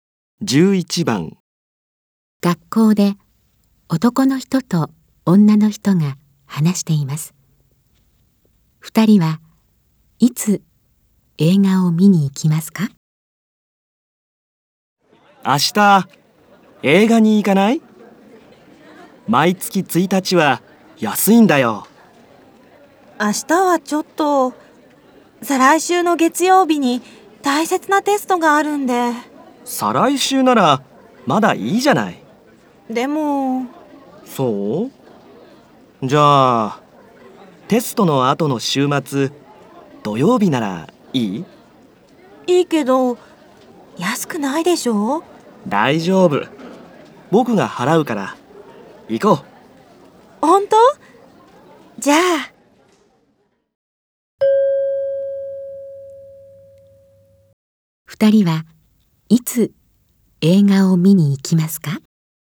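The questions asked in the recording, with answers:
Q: 二人はいつ映画を見に行きますか?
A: 再来週の土曜日(テストの後の週末)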